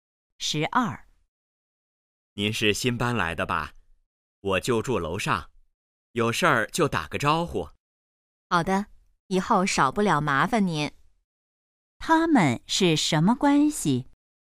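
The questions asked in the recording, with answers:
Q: 他们是什么关系?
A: 邻居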